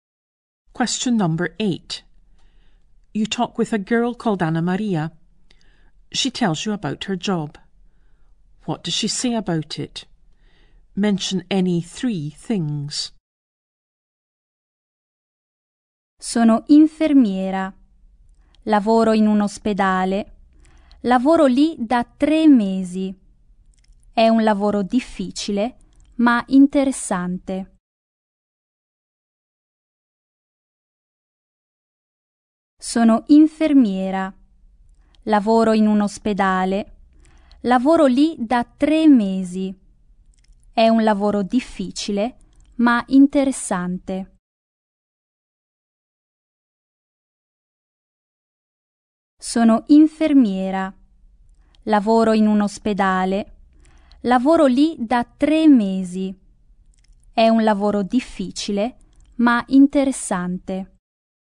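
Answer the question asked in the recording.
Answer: She is a nurse in a hospital; has worked there 3 months; difficult but interesting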